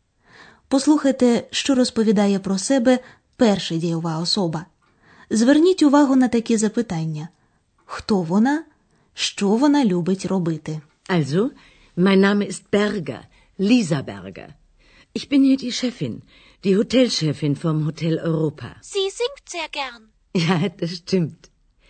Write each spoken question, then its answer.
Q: хто вона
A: Отже, це була пані Бергер, директорка готелю Європа.